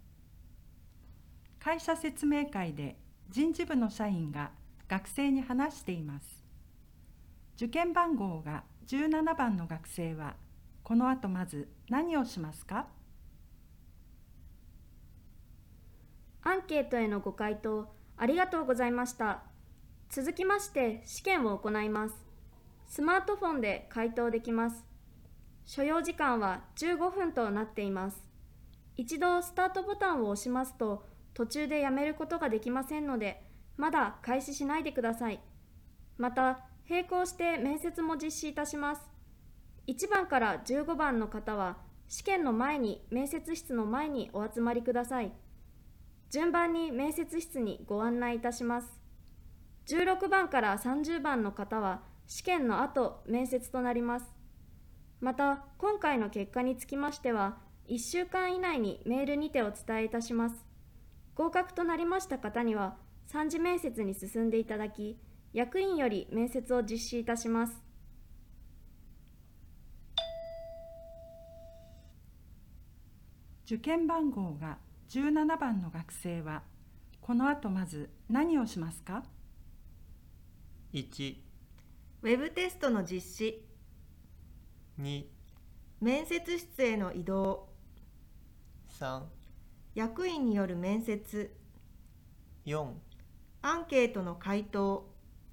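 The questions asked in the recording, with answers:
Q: 受験番号が17番の学生はこの後まず何をしますか?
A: 1: ウェブテストの実施。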